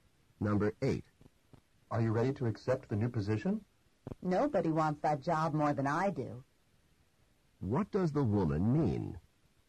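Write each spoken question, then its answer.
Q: What does the woman mean?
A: She really wants the job.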